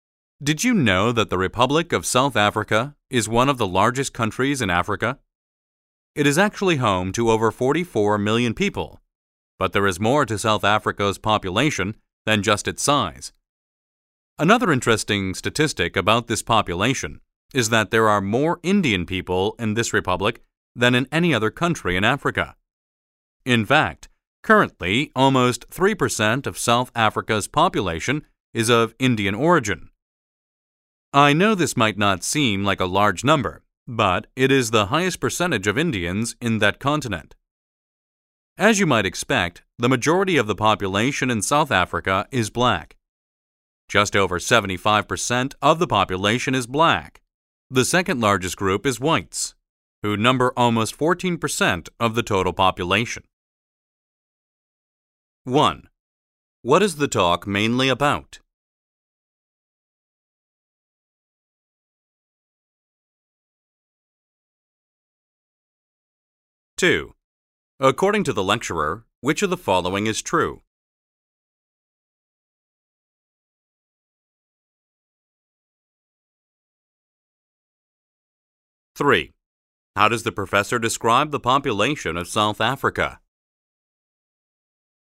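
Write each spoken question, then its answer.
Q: What is the talk mainly about?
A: The population of South Africa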